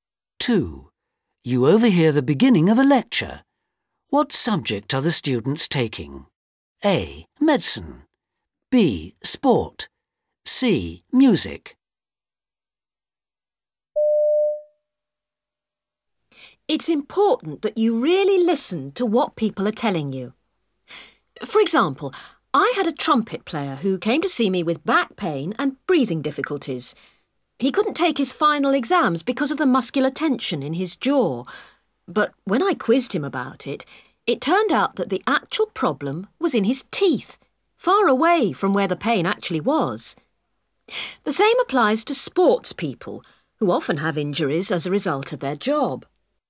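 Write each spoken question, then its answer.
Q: What subject are the students taking?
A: A: Medicine.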